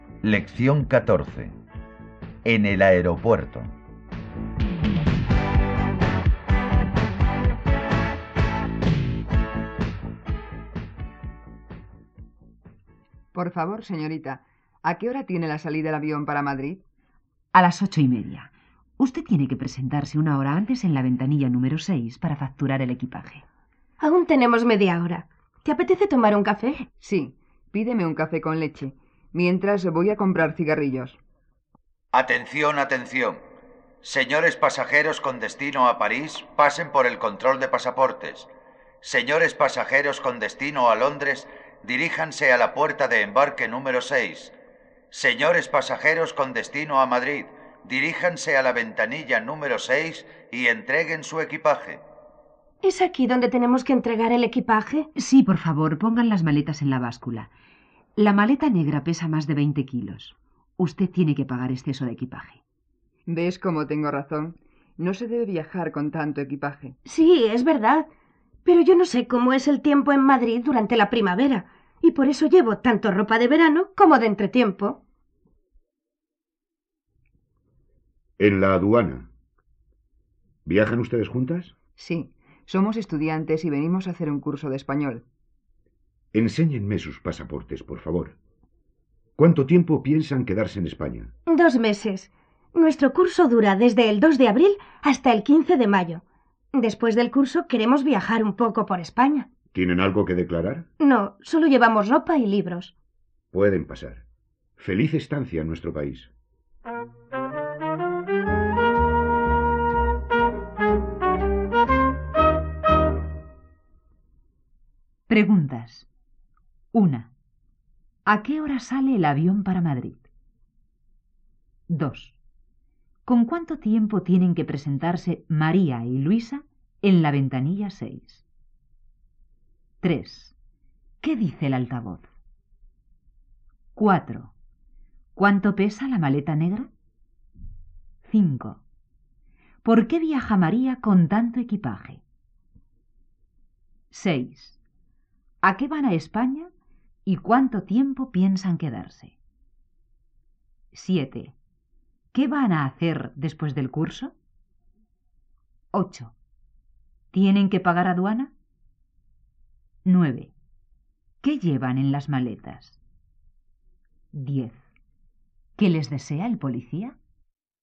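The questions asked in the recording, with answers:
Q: ¿A qué hora sale el avión para Madrid?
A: A las 8:30

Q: ¿Con cuánto tiempo tienen que presentarse María y Luisa en la ventanilla 6?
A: Una hora antes

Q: ¿Qué dice el altavoz?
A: Que los pasajeros con destino a Madrid se dirijan a la ventanilla 6 y entreguen su equipaje

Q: ¿Cuánto pesa la maleta negra?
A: Más de 20 kilos

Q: ¿Por qué viaja María con tanto equipaje?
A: Porque no sabe cómo es el tiempo en Madrid en primavera

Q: ¿A qué van a España y cuánto tiempo piensan quedarse?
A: A hacer un curso de español; 2 meses

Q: ¿Qué van a hacer después del curso?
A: Viajar un poco por España

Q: ¿Tienen que pagar aduana?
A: No, no tienen nada que declarar

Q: ¿Qué llevan en las maletas?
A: Ropa y libros

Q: ¿Qué les desea el policía?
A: Feliz estancia en su país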